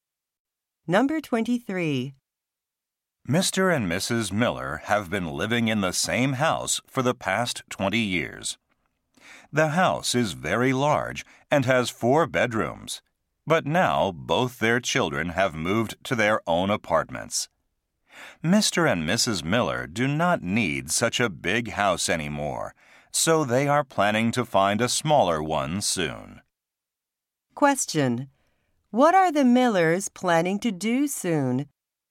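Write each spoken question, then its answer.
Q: What are the Millers planning to do soon?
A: Find a smaller house.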